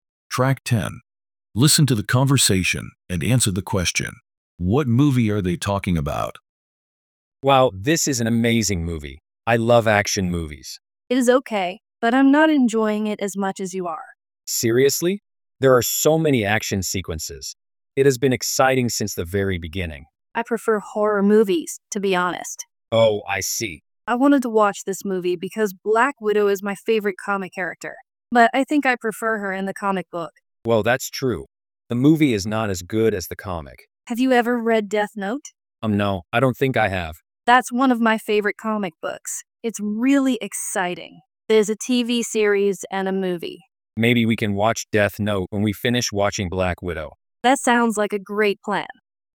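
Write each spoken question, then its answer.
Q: What movie are they talking about?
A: Black Widow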